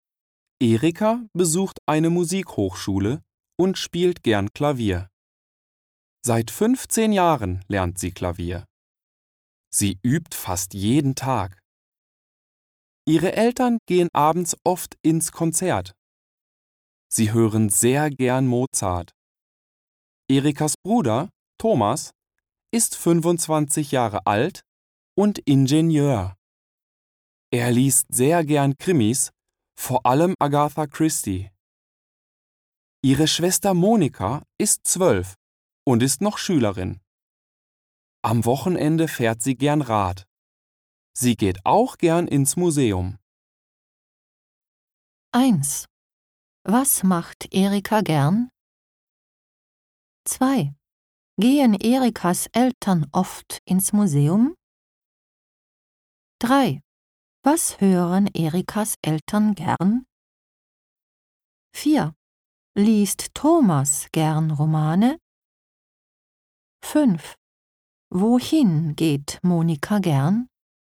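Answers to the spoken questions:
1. Sie spielt gern Klavier.
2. Nein, sie gehen oft ins Konzert.
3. Mozart
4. Nein, er liest gern Krimis.
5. Ins Museum.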